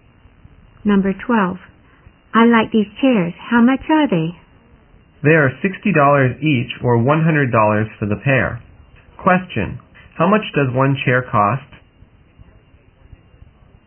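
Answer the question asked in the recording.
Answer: $60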